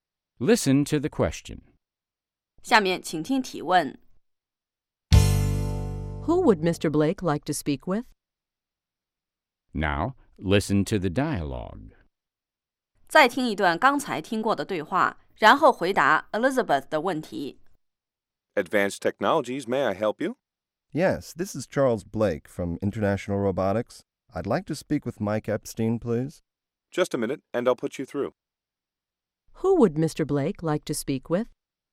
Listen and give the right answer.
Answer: He'd like to speak with Mr. Epstein.